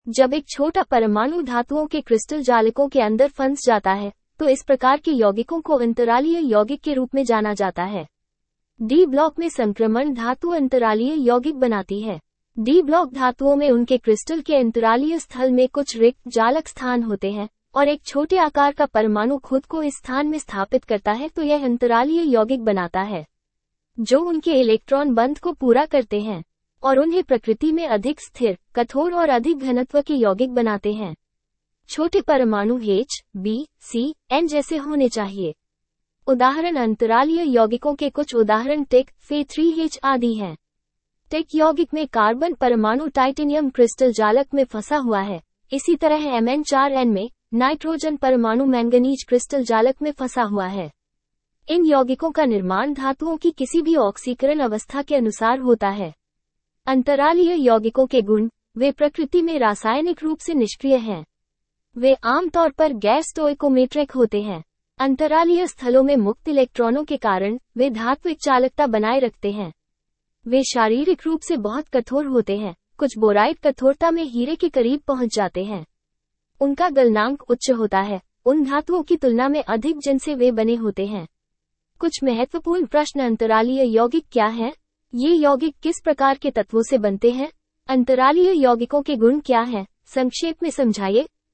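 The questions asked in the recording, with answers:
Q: अंतरालीय यौगिक क्या है?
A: जब एक छोटा परमाणु (H, B, C, N) धातुओं के crystal जालक के अंतरालीय रिक्त स्थानों में फंस जाता है, तो बनने वाले यौगिक को अंतरालीय यौगिक कहते हैं।

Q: ये यौगिक किस प्रकार के तत्वों से बनते हैं?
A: डी block की संक्रमण धातुओं और H, B, C, N जैसे छोटे परमाणुओं से

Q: अंतरालीय यौगिकों के गुण क्या हैं? संक्षेप में समझाइए।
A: ये रासायनिक रूप से निष्क्रिय होते हैं, प्रायः गैर-stoichiometric होते हैं, धात्विक चालकता बनाए रखते हैं, बहुत कठोर होते हैं और इनका गलनांक मूल धातुओं से अधिक होता है।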